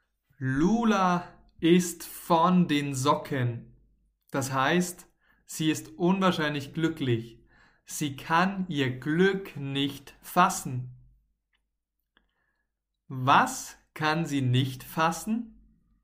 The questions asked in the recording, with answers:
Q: Was kann sie nicht fassen?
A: Ihr Glück. Lula kann ihr Glück nicht fassen.